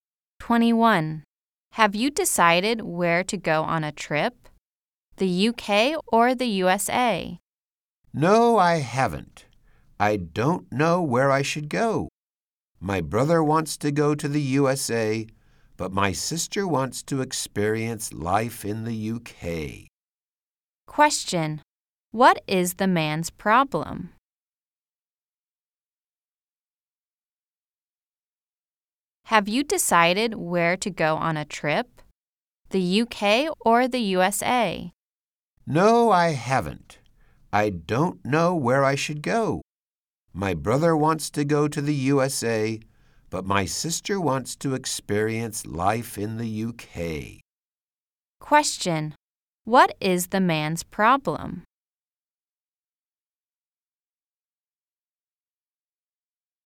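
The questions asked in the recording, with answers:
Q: Question: What is the man's problem?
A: He can't decide whether to go to the UK or the USA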